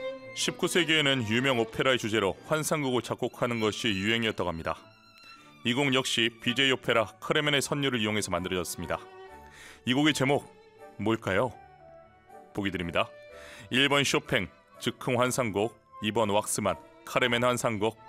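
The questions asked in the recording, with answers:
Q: 이 곡의 제목 뭘까요?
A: 2번: 왁스만, 카르멘 환상곡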